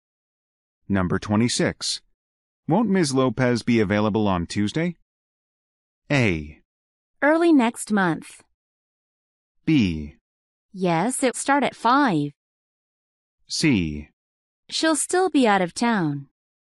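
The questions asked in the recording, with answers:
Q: Won't Ms. Lopez be available on Tuesday?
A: C: She'll still be out of town.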